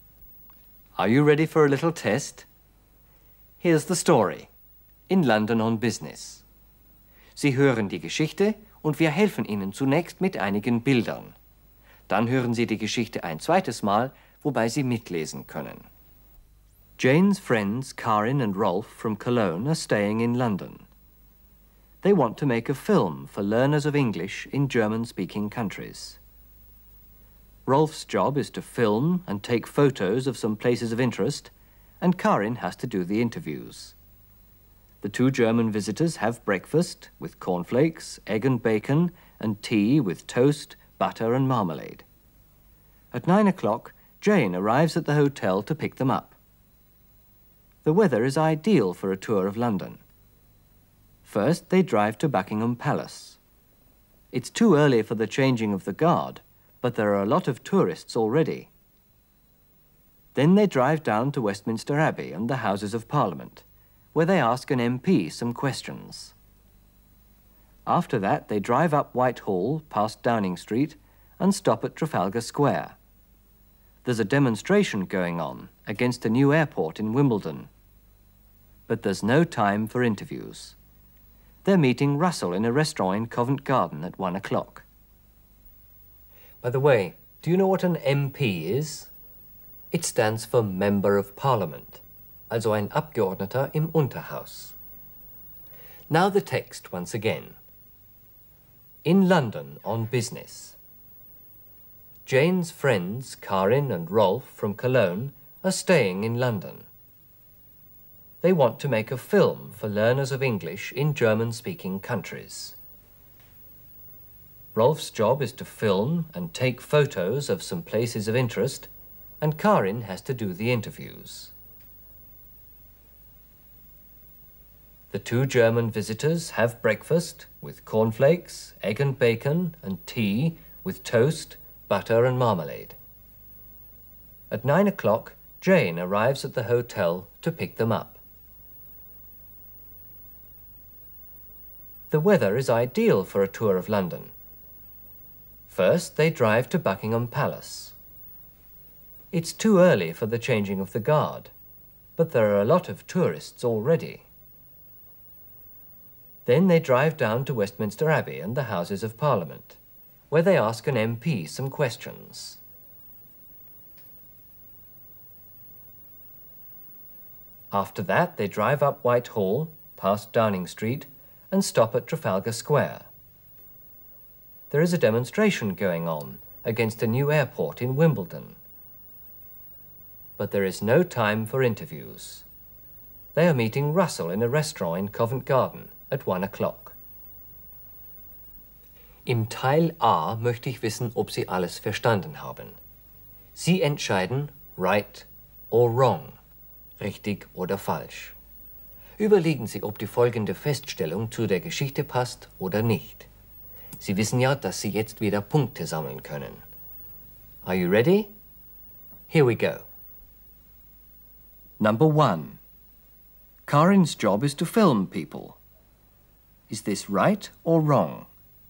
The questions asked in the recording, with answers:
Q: Karin's job is to film people. Is this right or wrong?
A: It's wrong. It's Rolf's job to do this, to film people.